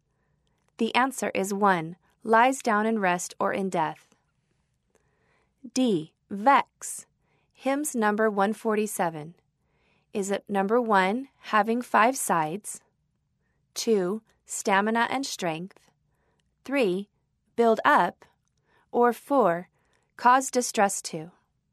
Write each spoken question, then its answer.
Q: vex, Hymns Number 147.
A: The answer is four, cause distress to.